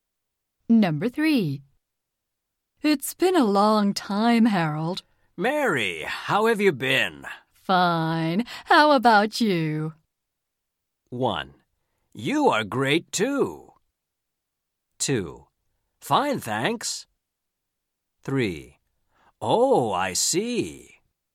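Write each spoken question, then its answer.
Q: Fine. How about you?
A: 2: Fine, thanks.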